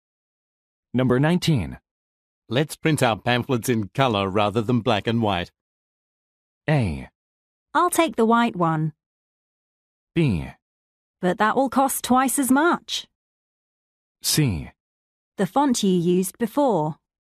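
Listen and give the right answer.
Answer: B: But that will cost twice as much.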